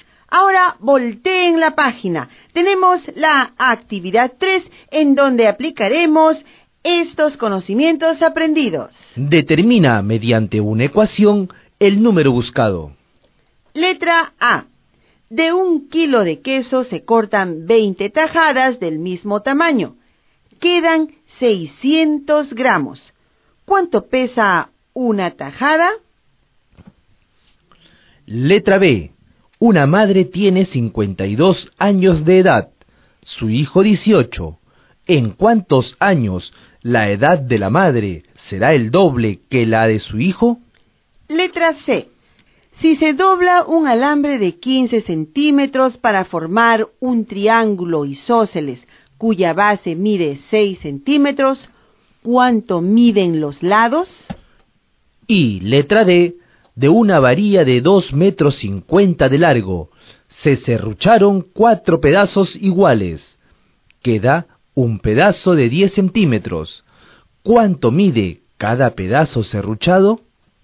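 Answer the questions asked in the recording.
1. 20 gramos
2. 16 años
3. 4,5 cm cada uno
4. 60 cm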